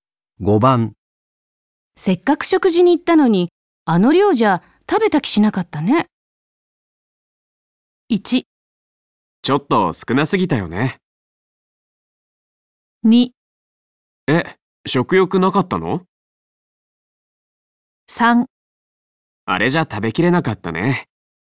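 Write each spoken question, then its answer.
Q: せっかく食事に行ったのに、あの量じゃ食べた気しなかったね。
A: 1: ちょっと少なすぎたよね。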